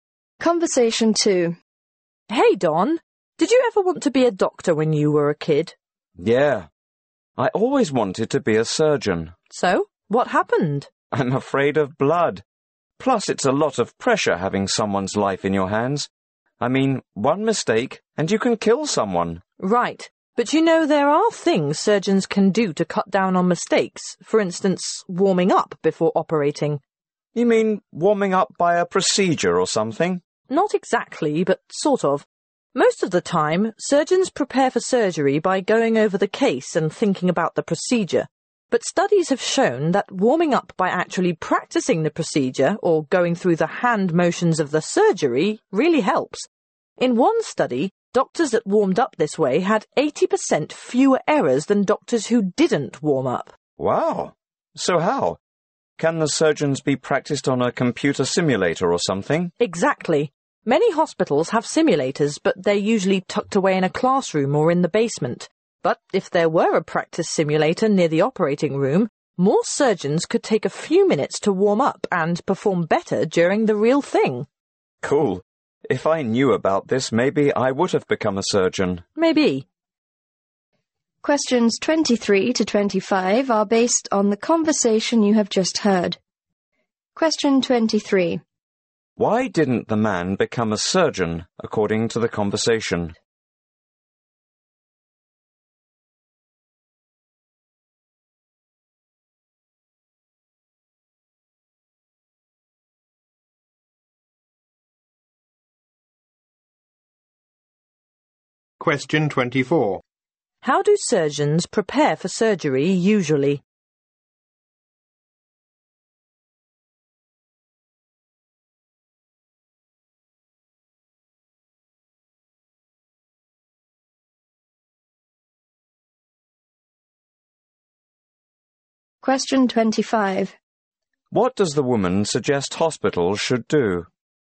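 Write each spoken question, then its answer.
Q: Why didn't the man become a surgeon, according to the conversation?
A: He is afraid of blood and of the pressure

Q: How do surgeons prepare for surgery usually?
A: By going over the case and thinking about the procedure

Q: What does the woman suggest hospitals should do?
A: Put practice simulators near the operating rooms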